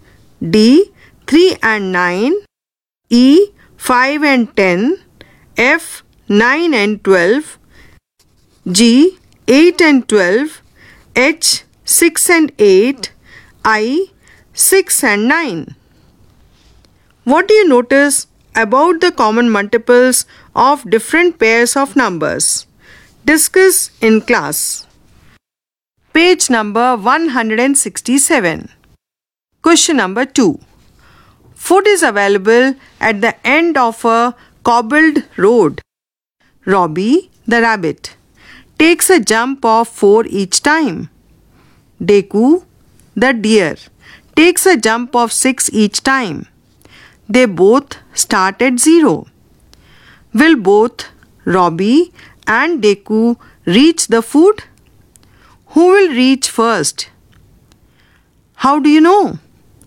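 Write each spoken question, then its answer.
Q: Will both Robbie and Deku reach the food?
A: No, only Robbie reaches 64 (multiple of 4, not 6)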